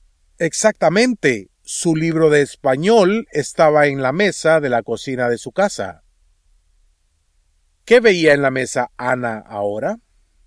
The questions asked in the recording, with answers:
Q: ¿Qué veía en la mesa Ana ahora?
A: Ana veía su libro.